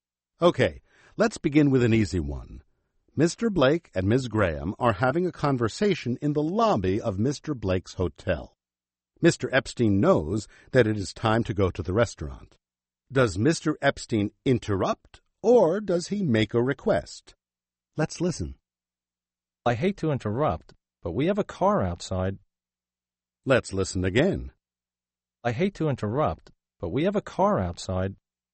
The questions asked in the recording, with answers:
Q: Does Mr. Epstein interrupt or does he make a request?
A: He is interrupting.